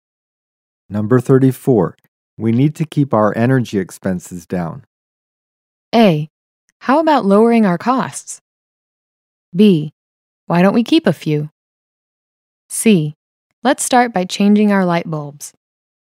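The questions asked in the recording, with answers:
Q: We need to keep our energy expenses down.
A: C: Let's start by changing our light bulbs.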